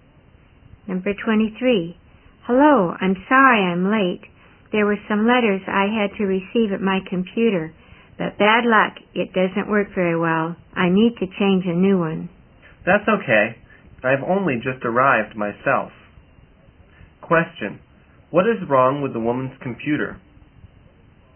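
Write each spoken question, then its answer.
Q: What is wrong with the woman's computer?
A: It doesn't work very well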